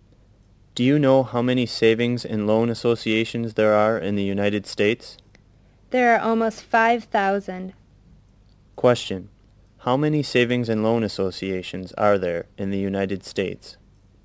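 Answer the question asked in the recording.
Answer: Almost 5,000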